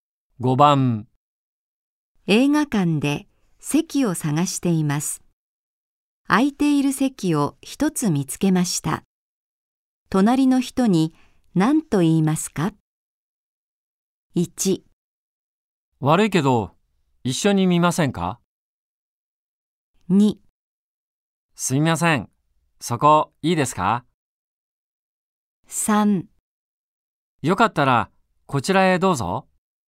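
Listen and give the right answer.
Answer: 2: すみません、そこいいですか?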